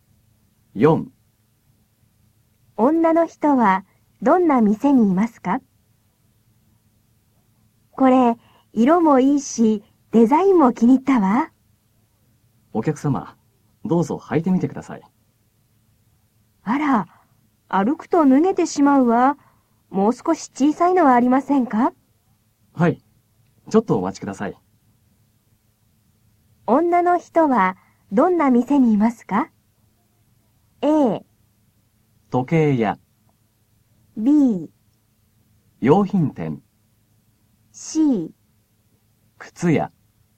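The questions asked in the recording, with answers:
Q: 女の人はどんな店にいますか?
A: C: 靴屋。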